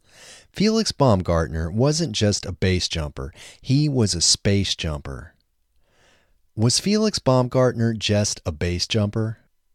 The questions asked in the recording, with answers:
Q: Was Felix Baumgartner just a base jumper?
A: No, Felix Baumgartner wasn't just a base jumper, he was a space jumper.